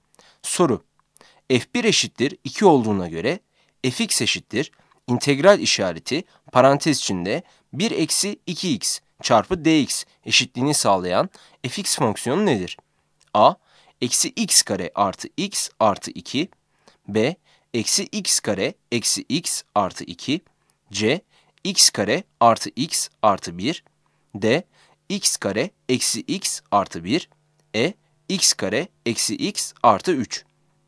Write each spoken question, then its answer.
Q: F1 eşittir 2 olduğuna göre fx eşittir integral işareti parantez içinde 1 eksi 2x çarpı dx eşitliğini sağlayan fx fonksiyonu nedir?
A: Yanıt A'dır.